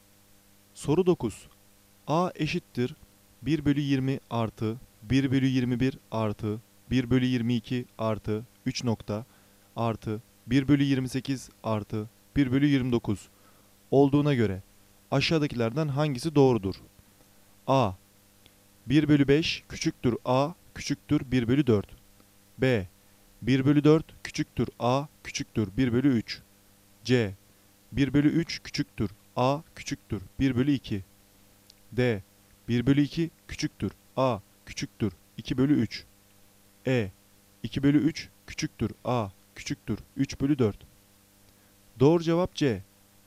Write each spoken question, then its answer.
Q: 1/21 + 1/22 + 3. + 1/28 + 1/29 olduğuna göre aşağıdakilerden hangisi doğrudur?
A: Doğru cevap C.